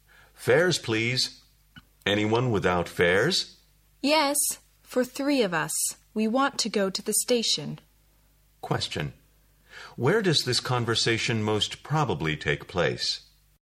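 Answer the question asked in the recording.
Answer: On a bus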